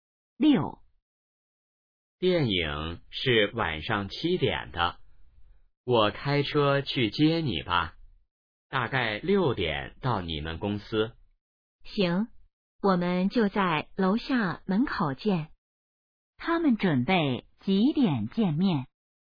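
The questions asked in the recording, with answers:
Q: 他们准备几点见面?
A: 6点左右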